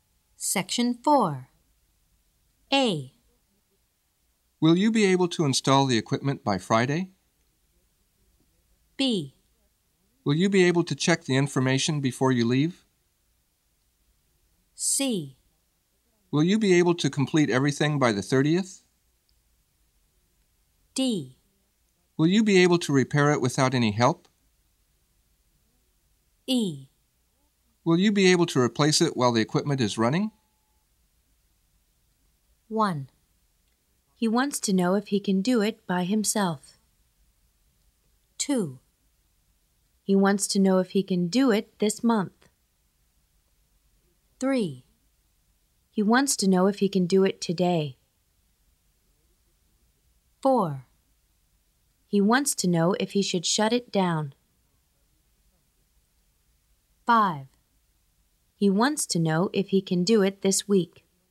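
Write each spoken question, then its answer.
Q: He wants to know if he can do it by himself.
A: D: Will you be able to repair it without any help?

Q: He wants to know if he can do it this month.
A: C: Will you be able to complete everything by the 30th?

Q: He wants to know if he can do it today.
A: B: Will you be able to check the information before you leave?

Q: He wants to know if he should shut it down.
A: E: Will you be able to replace it while the equipment is running?

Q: He wants to know if he can do it this week.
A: A: Will you be able to install the equipment by Friday?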